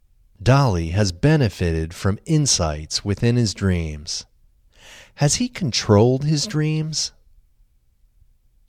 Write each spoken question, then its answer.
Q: Has he controlled his dreams?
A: No, he has not controlled his dreams.